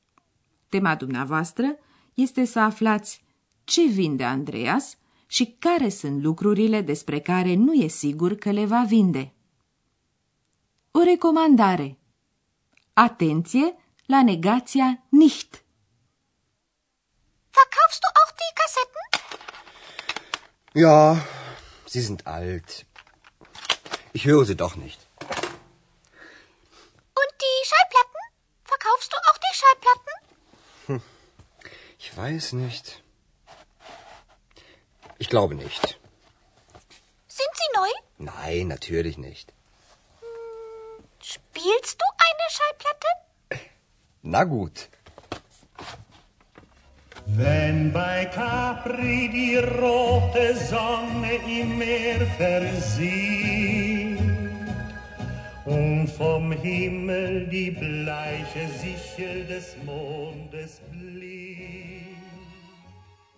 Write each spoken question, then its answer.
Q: Tema dumneavoastră este să aflați ce vinde Andreas și care sunt lucrurile despre care nu e sigur că le va vinde.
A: Andreas vrea să vândă casetele. Despre discuri nu știe încă nici el dacă le va vinde sau nu.